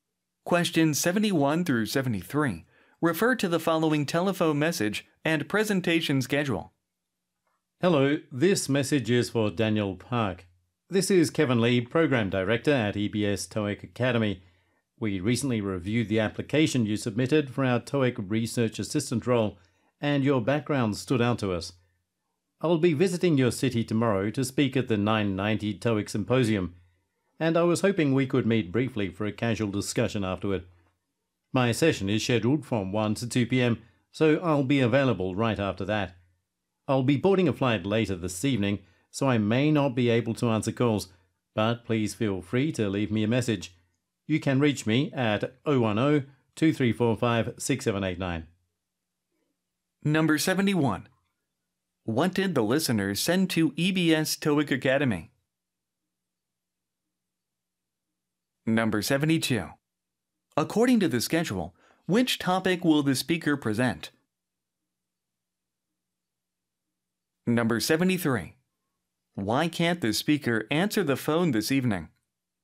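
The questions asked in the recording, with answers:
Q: What did the listener send to EBS TOEIC Academy?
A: An application for the TOEIC Research Assistant role

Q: Why can't the speaker answer the phone this evening?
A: He will be boarding a flight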